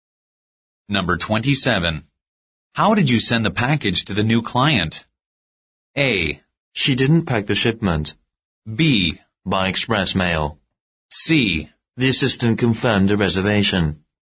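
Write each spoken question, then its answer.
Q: How did you send the package to the new client?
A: B: By express mail.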